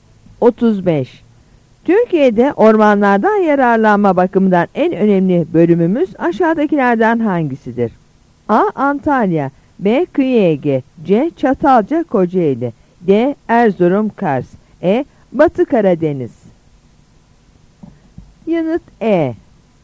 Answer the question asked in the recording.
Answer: Yanıt E.